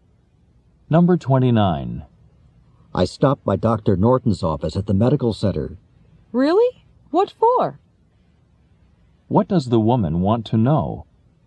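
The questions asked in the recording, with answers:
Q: What does the woman want to know?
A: Why the man went to Dr. Norton's office.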